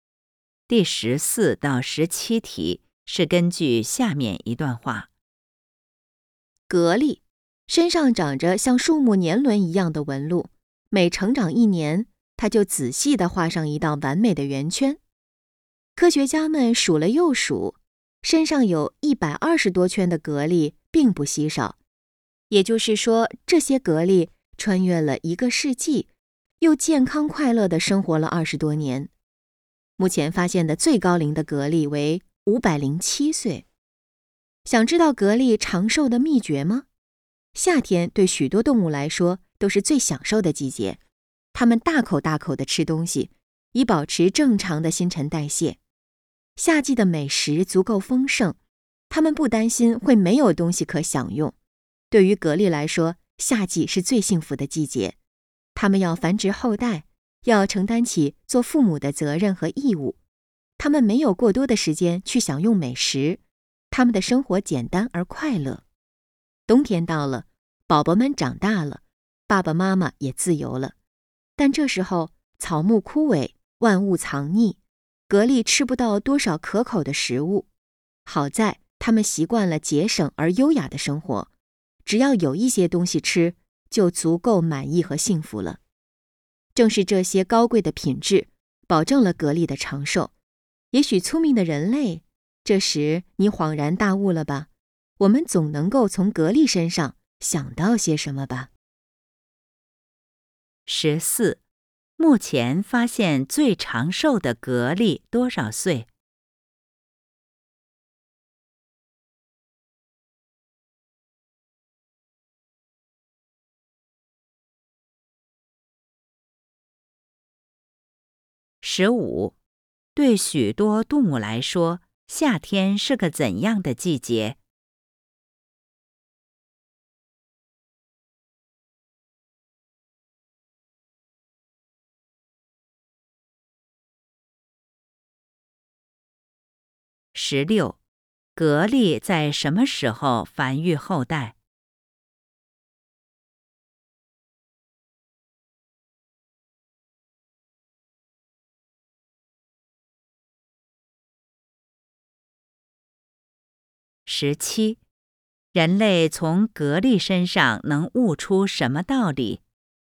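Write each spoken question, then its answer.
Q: 目前发现最长寿的蛤蜊多少岁?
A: 507岁

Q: 对许多动物来说,夏天是个怎样的季节?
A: 最享受的季节

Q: 蛤蜊在什么时候繁育后代?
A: 夏天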